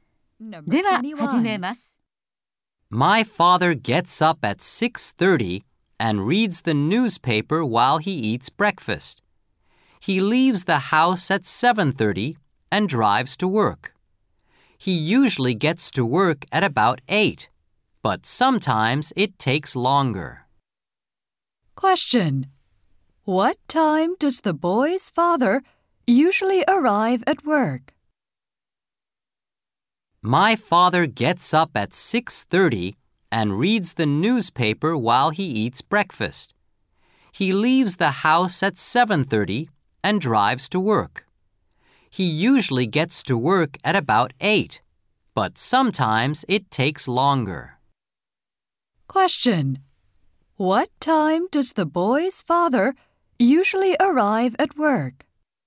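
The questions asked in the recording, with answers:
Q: What time does the boy's father usually arrive at work?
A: At about 8.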